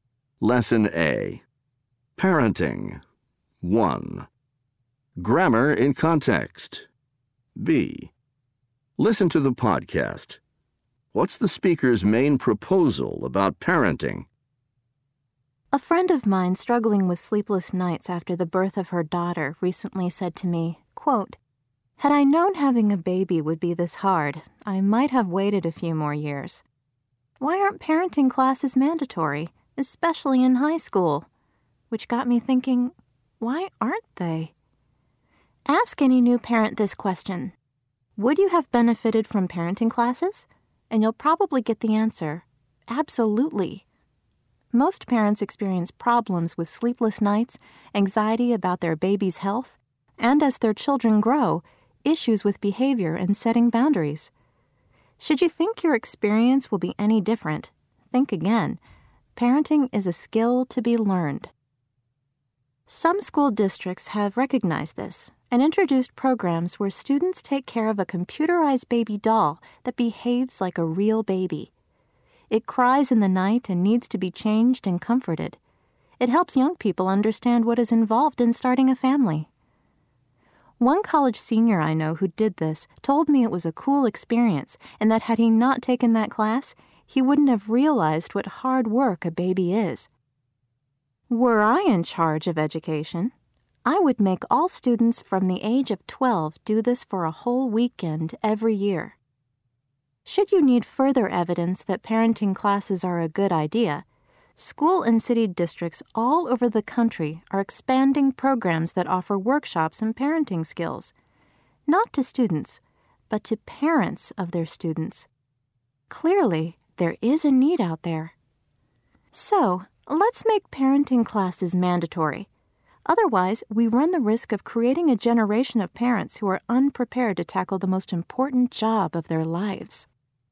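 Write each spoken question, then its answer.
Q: What's the speaker's main proposal about parenting?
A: Parenting classes should be mandatory, especially in high school.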